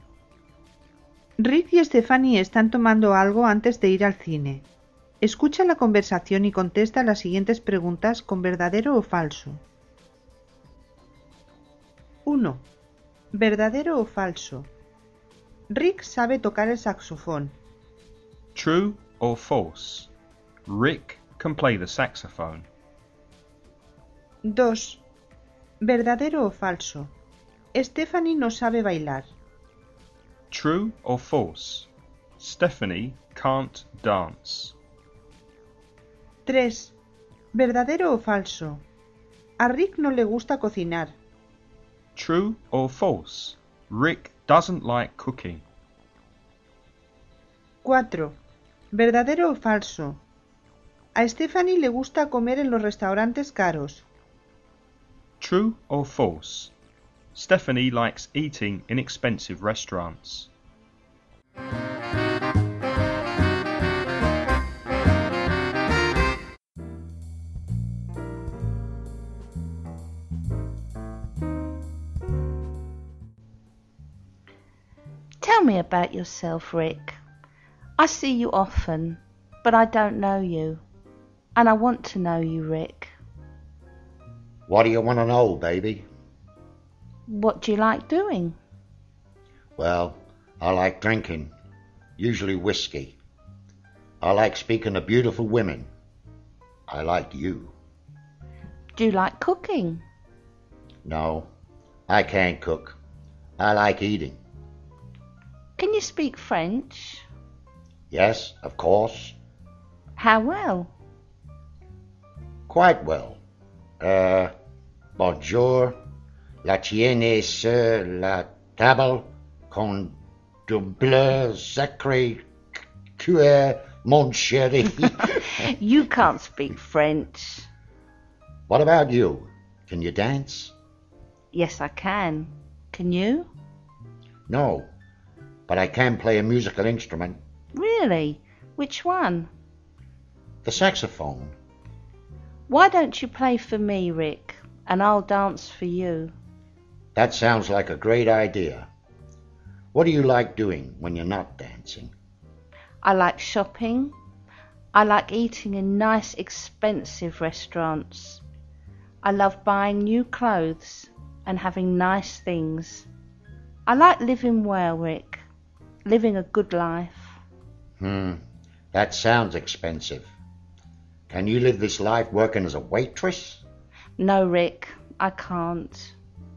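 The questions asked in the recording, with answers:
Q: ¿Verdadero o falso? Rick sabe tocar el saxofón.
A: ¿Verdadero?

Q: ¿Verdadero o falso? Stephanie no sabe bailar.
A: Falso

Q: ¿Verdadero o falso? A Rick no le gusta cocinar.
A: Verdadero

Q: ¿Verdadero o falso? A Stephanie le gusta comer en los restaurantes caros.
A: Verdadero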